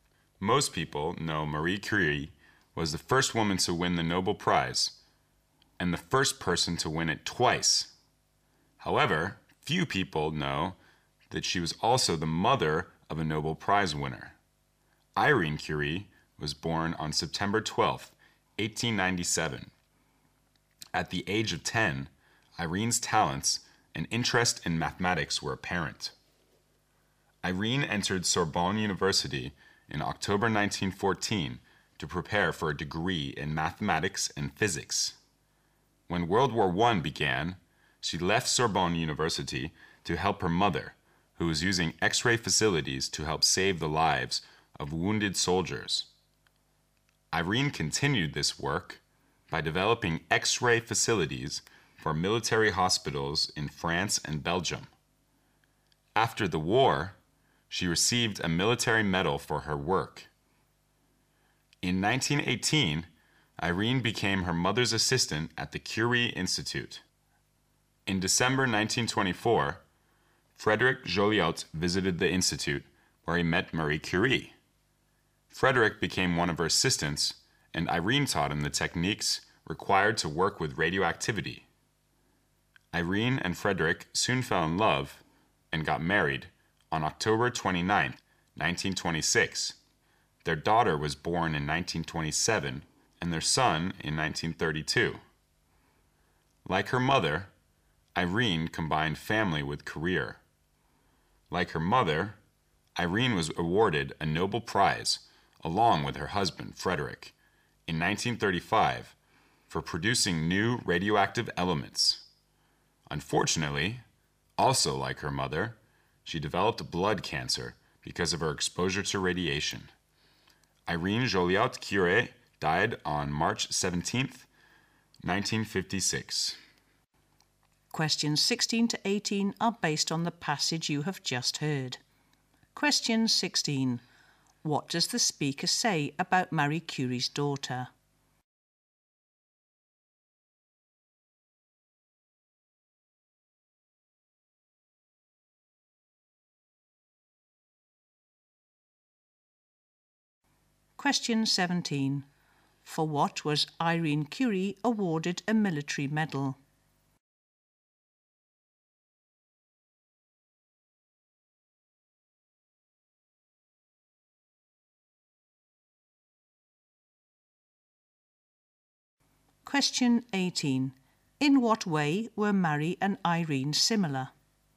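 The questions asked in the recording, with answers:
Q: What does the speaker say about Marie Curie's daughter?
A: She was also a Nobel Prize winner

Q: For what was Irene Curie awarded a military medal?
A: Developing X-ray facilities for military hospitals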